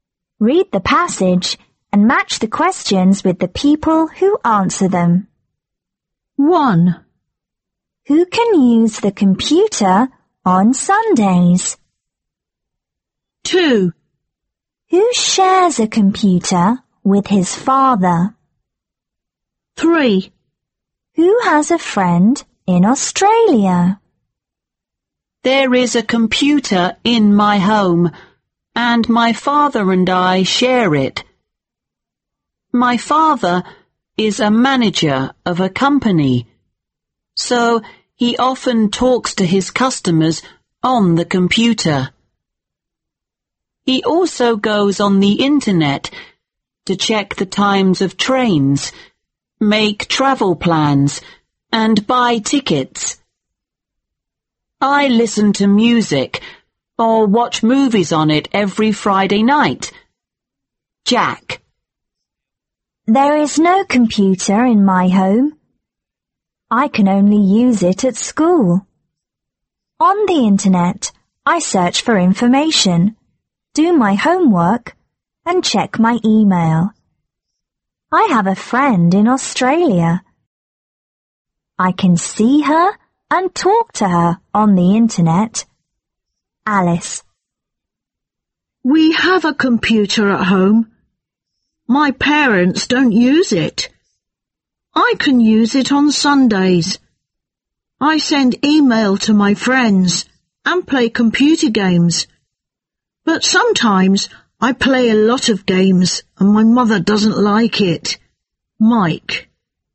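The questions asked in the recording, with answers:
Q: Who can use the computer on Sundays?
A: Mike

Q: Who shares a computer with his father?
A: Jack

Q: Who has a friend in Australia?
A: Alice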